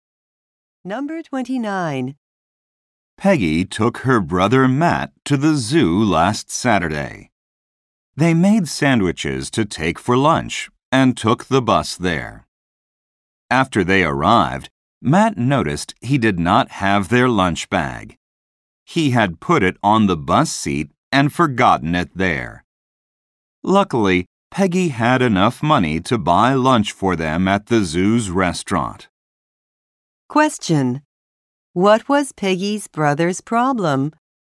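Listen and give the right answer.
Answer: He left their lunch bag on the bus.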